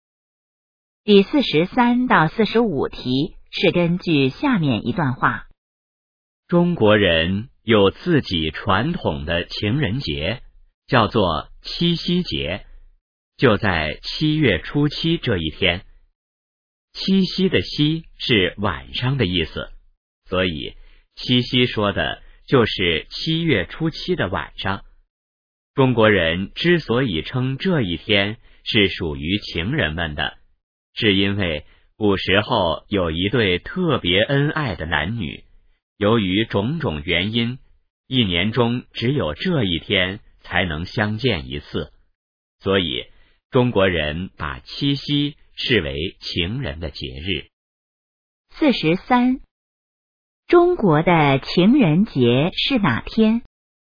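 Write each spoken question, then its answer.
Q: 中国的情人节是哪天?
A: 七月初七(七夕节)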